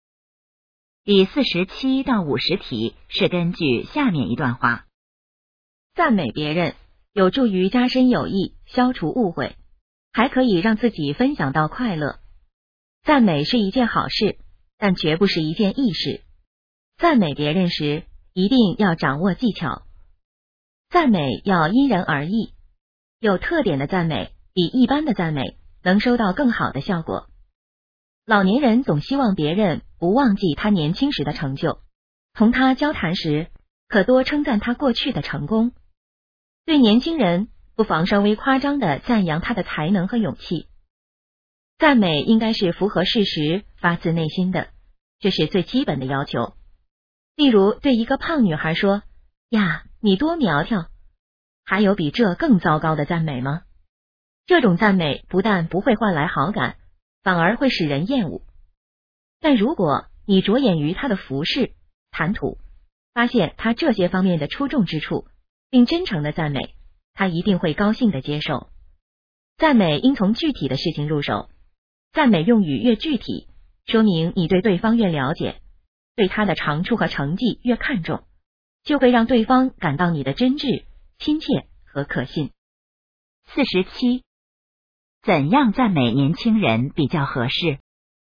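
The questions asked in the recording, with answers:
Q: 怎样赞美年轻人比较合适?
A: 稍微夸张地赞扬他的才能和勇气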